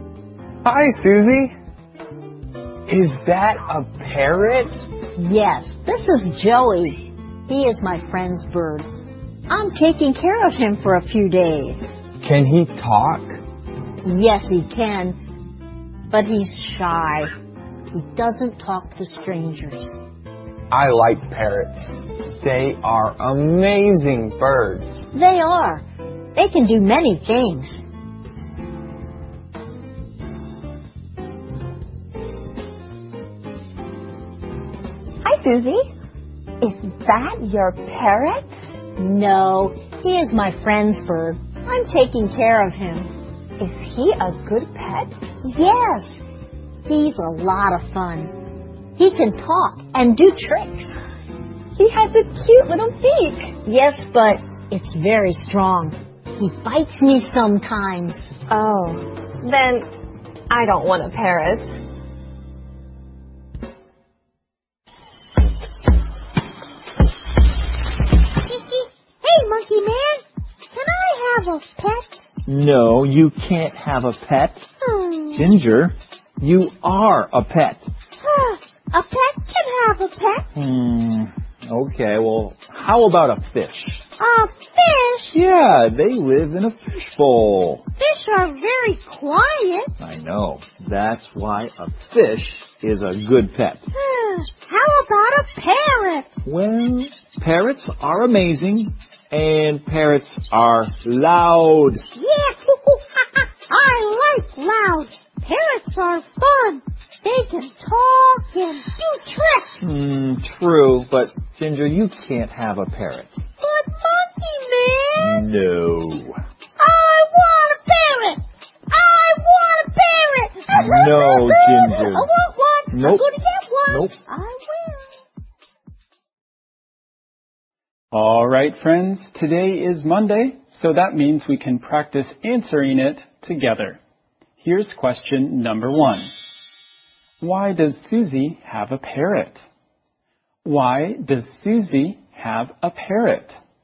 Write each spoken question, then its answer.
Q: Why does Susie have a parrot?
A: She is taking care of it for a few days.